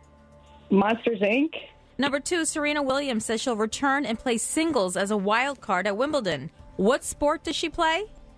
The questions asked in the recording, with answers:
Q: What sport does she play?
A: Tennis.